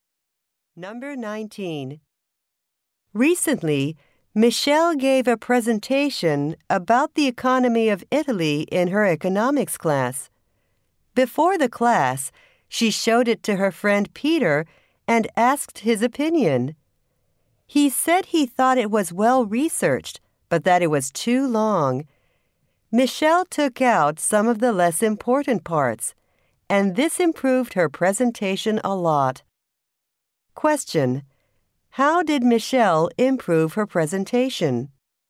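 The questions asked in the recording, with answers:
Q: How did Michelle improve her presentation?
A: She made it shorter by taking out less important parts.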